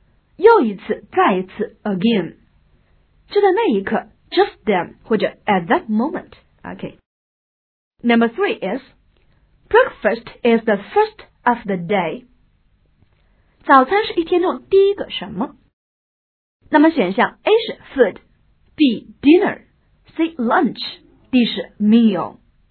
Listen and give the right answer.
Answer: 第一顿饭答应该是 D meal